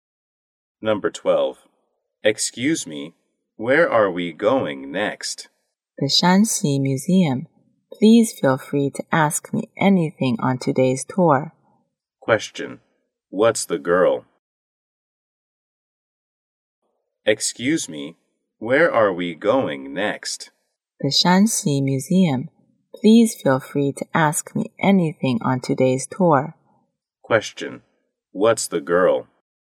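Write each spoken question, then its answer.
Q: What's the girl?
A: A tour guide.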